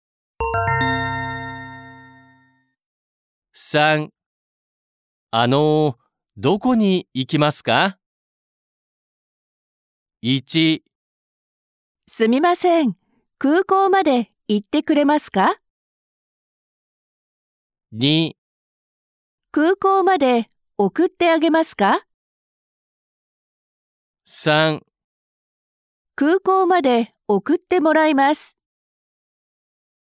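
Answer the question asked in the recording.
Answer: 1: すみません、空港まで行ってくれますか?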